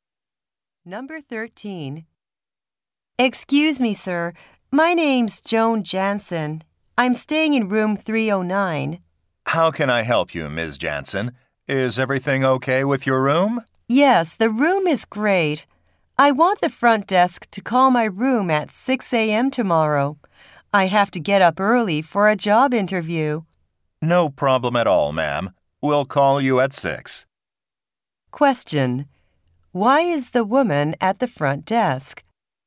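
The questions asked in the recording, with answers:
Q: Why is the woman at the front desk?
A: To ask for a 6 a.m. wake-up call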